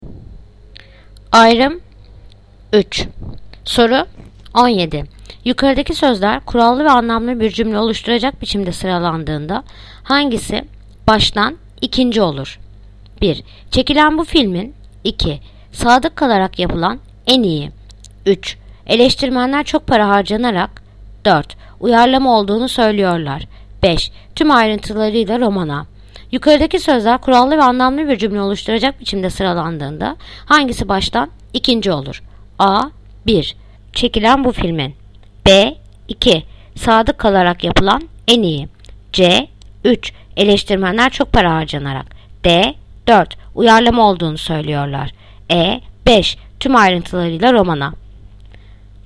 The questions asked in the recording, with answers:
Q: Yukarıdaki sözler kurallı ve anlamlı bir cümle oluşturacak biçimde sıralandığında hangisi baştan ikinci olur?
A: Adana. 1. Çekilen bu filmin.